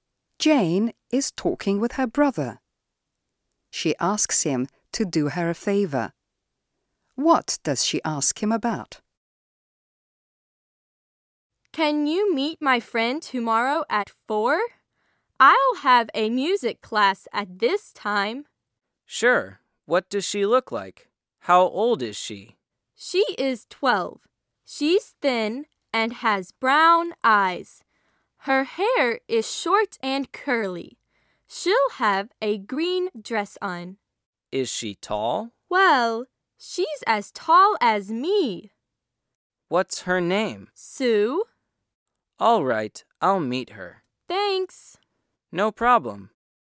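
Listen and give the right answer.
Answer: To meet her friend Sue tomorrow at 4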